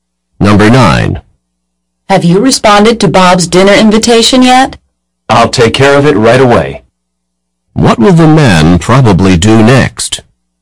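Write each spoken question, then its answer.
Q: What will the man probably do next?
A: Respond to Bob's dinner invitation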